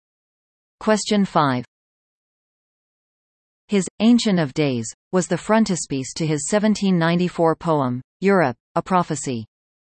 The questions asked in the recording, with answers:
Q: His Ancient of Days was the frontispiece to his 1794 poem, Europe, a Prophecy.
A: The answer is Blake.